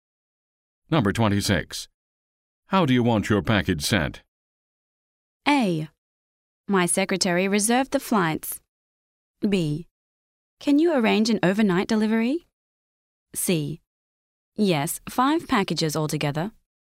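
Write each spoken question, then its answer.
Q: How do you want your package sent?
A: B: Can you arrange an overnight delivery?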